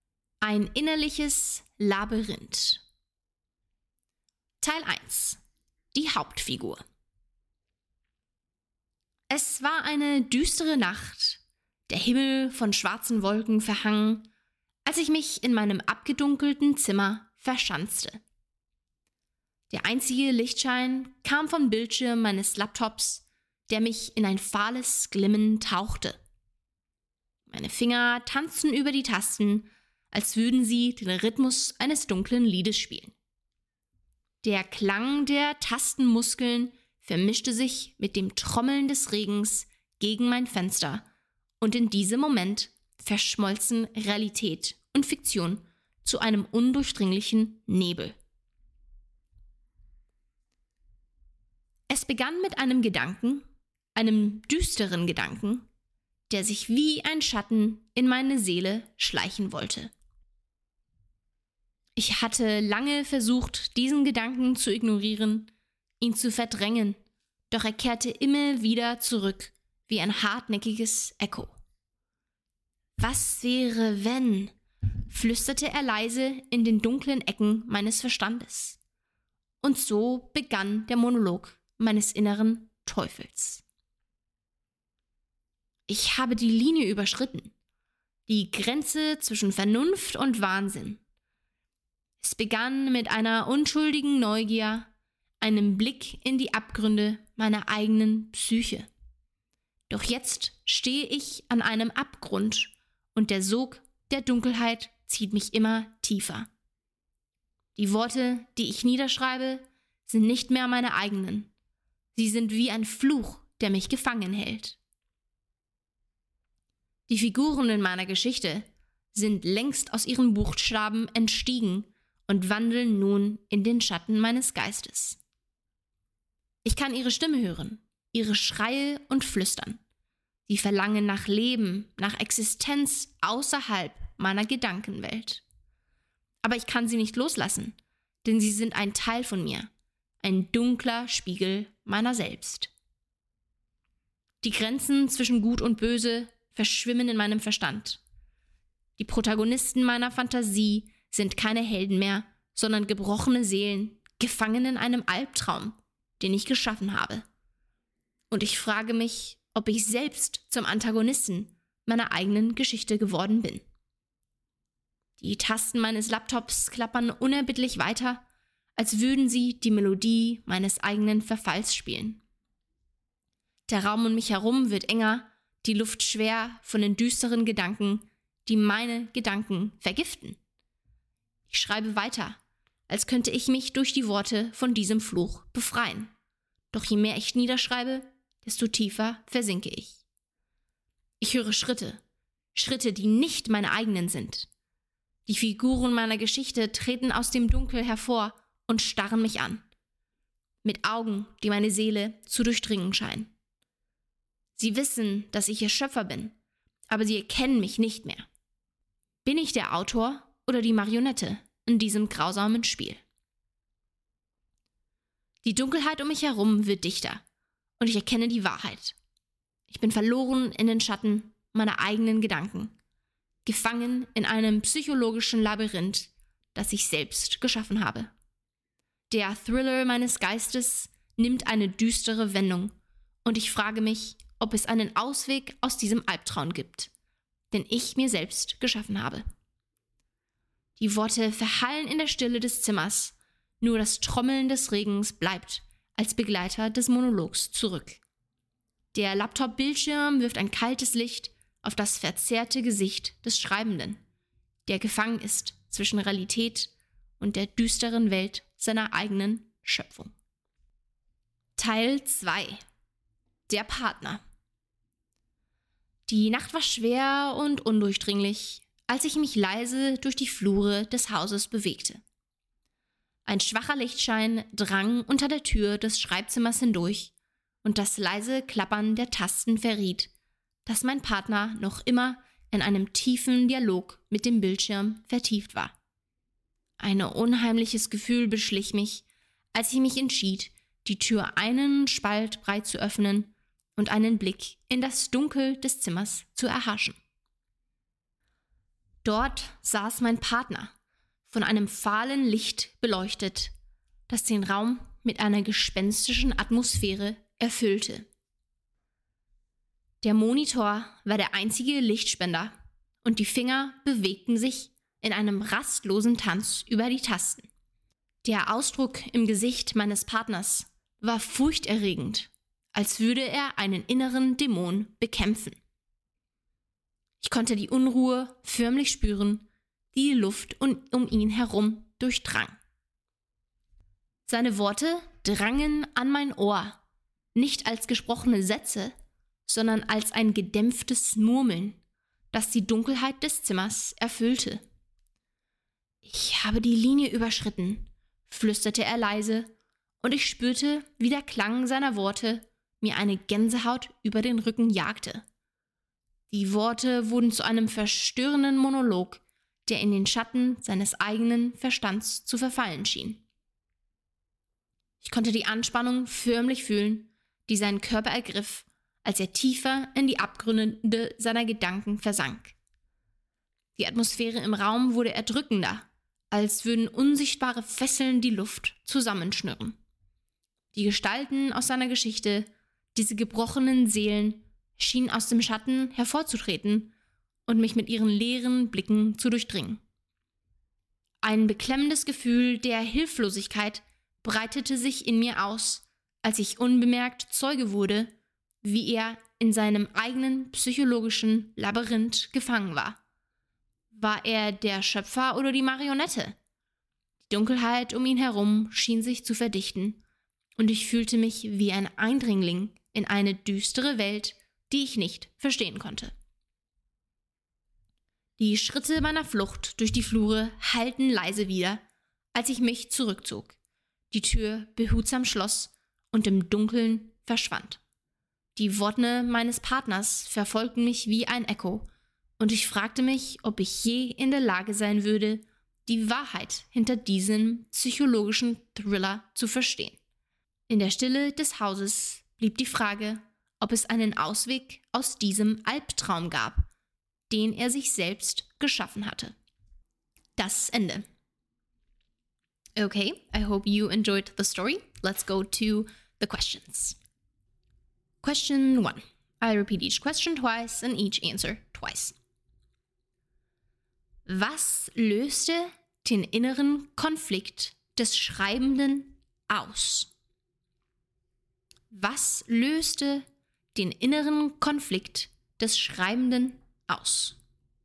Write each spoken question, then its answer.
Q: Was löste den inneren Konflikt des Schreibenden aus?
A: Der Schreibende wurde von einem düsteren Gedanken geplagt, der die Grenzen zwischen Vernunft und Wahnsinn verschwimmen ließ.